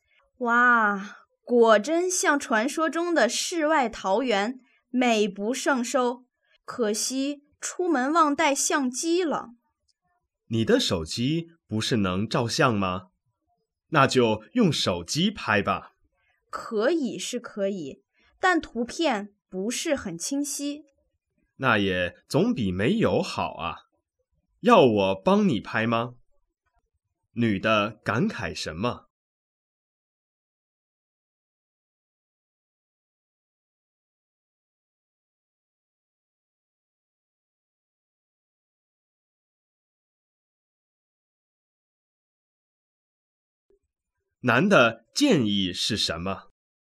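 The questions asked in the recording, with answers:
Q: 男的建议是什么?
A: 用手机拍照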